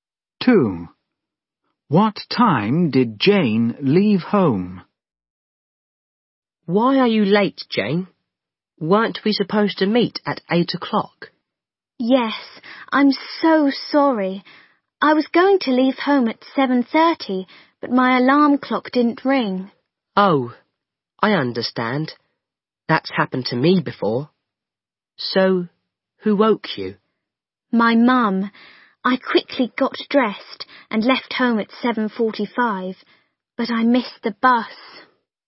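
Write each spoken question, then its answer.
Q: What time did Jane leave home?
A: At 7:45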